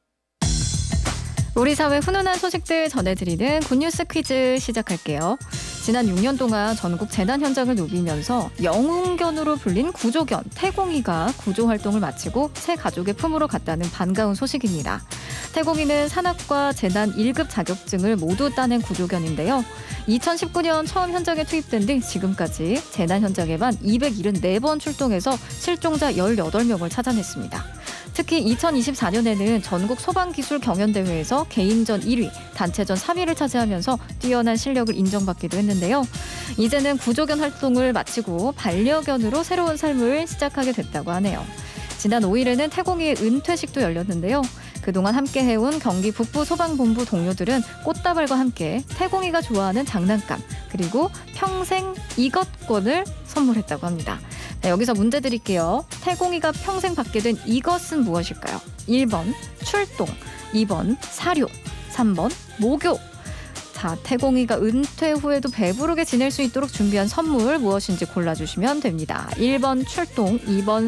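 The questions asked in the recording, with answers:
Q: 태공이가 평생 받게 된 이것은 무엇일까요?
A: 2번: 사료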